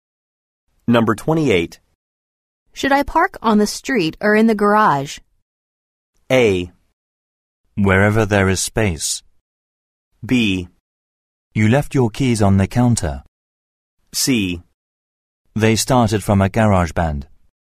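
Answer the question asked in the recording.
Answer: A: Wherever there is space.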